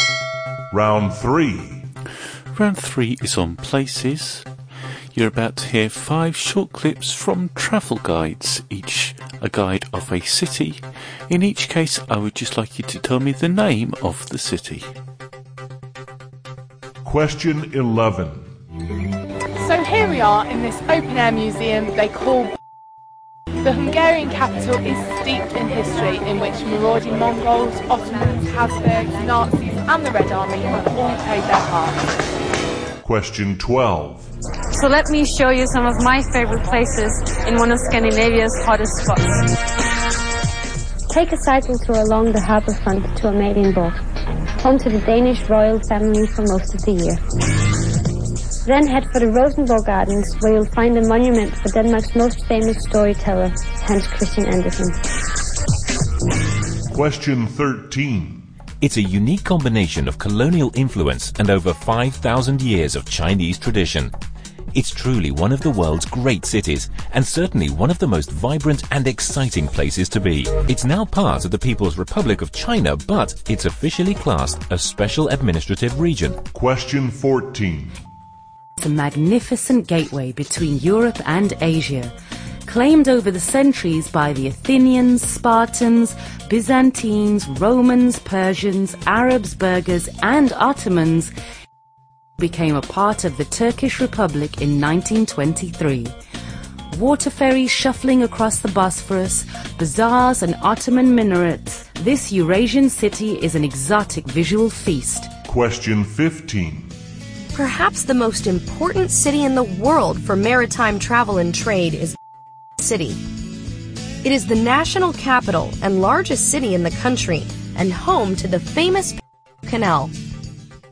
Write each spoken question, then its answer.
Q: In each case, I would just like you to tell me the name of the city.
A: the answer to number 11 was Budapest

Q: In each case, I would just like you to tell me the name of the city.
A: Number 12 was Copenhagen.

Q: In each case, I would just like you to tell me the name of the city.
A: number 13, Hong Kong

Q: In each case, I would just like you to tell me the name of the city.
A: Number 14 was Istanbul.

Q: In each case, I would just like you to tell me the name of the city.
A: number 15 was Panama City